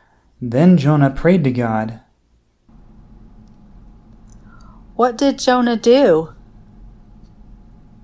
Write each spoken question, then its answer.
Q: What did Jonah do?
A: Jonah prayed.